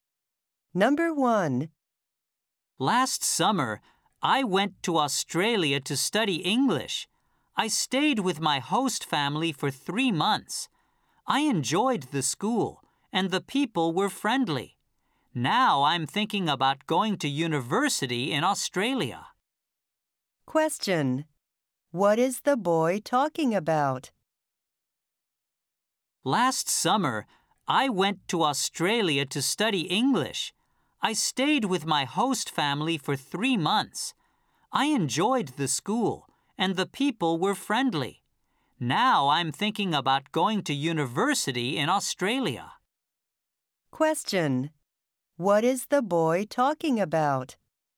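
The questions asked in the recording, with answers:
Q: What is the boy talking about?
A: His stay in Australia last summer to study English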